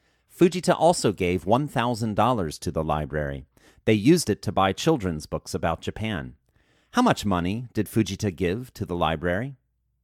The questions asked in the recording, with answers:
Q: How much money did Fujita give to the library?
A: Fujita gave $1,000 to the library.